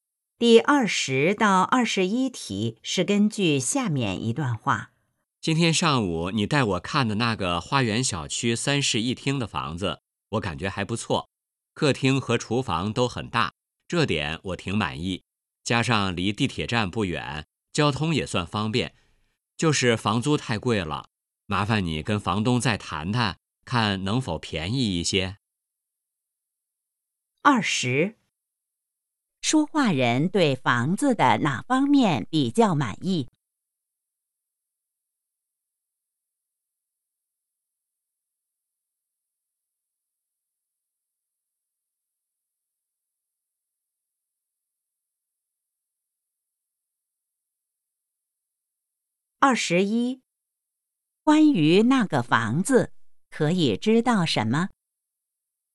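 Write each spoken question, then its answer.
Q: 说话人对房子的哪方面比较满意?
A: 客厅和厨房都很大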